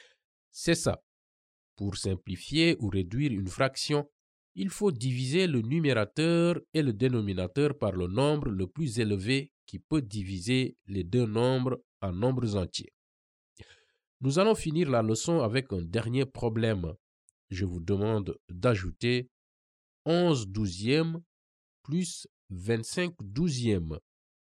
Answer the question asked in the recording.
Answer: Si je divise 36 par 12, je trouve 3.